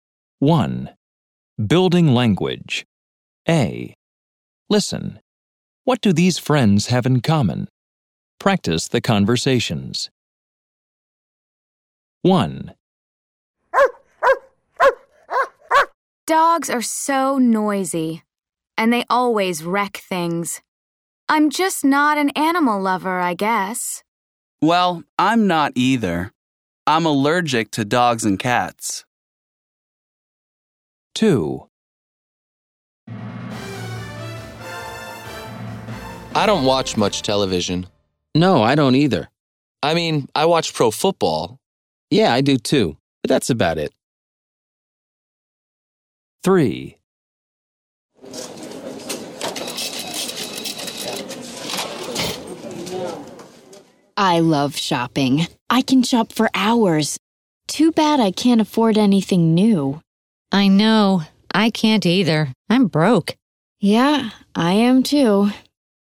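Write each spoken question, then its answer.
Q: What do these friends have in common?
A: Neither of them is an animal lover.

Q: What do these friends have in common?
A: They don't watch much TV, only pro football.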